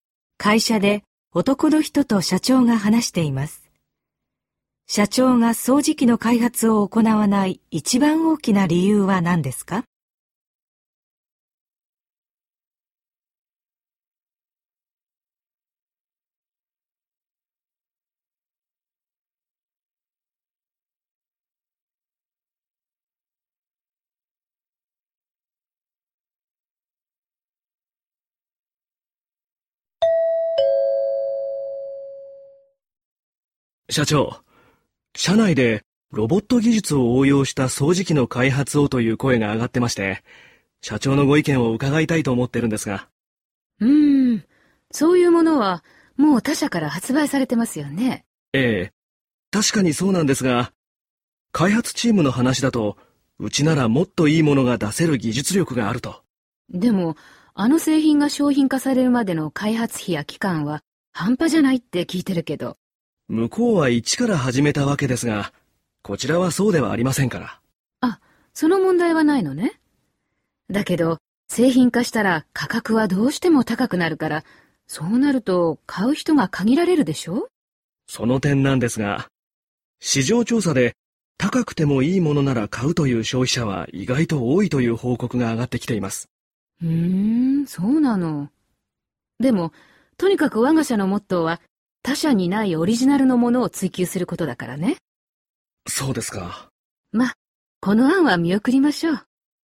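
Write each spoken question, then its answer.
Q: 社長が掃除機の開発を行わない一番大きな理由は何ですか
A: 他社にないオリジナルのものを追求するのが会社のモットーだから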